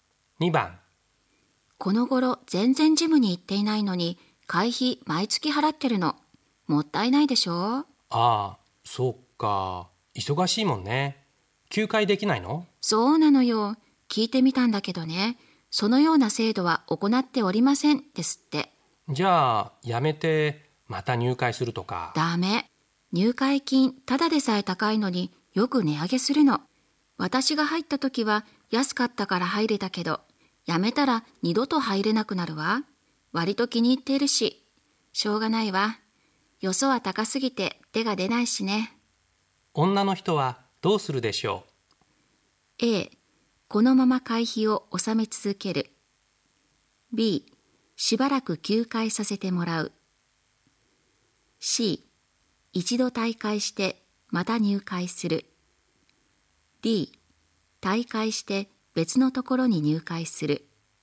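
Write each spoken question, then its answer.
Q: 女の人はどうするでしょう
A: A: このまま会費を納め続ける。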